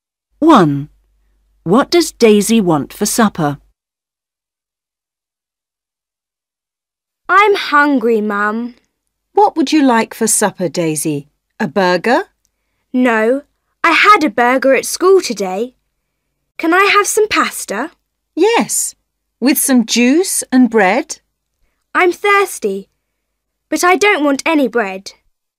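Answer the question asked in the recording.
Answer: pasta and juice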